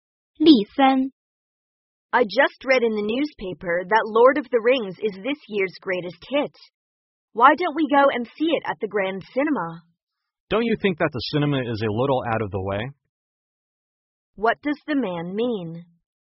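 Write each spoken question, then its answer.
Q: What does the man mean?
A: The Grand Cinema is too far away.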